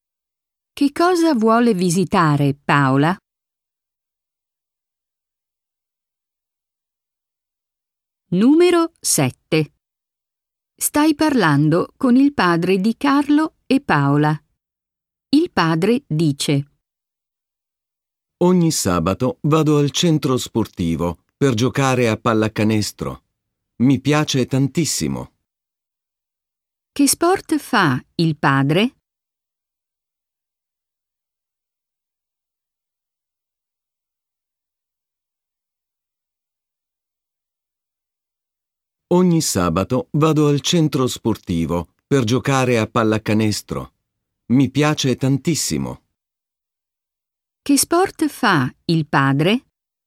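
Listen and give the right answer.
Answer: Pallacanestro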